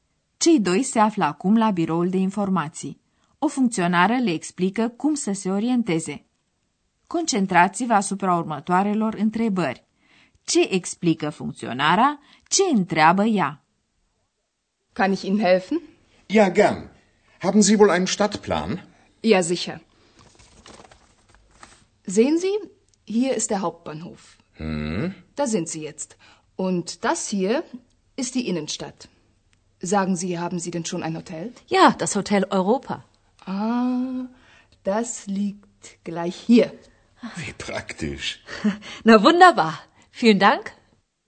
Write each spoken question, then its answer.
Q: Ce explică funcționara?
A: Funcționarea de la biroul de informații le arată pe plan unde se găsesc

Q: Ce întreabă ea?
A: și întreabă dacă au găsit deja un hotel.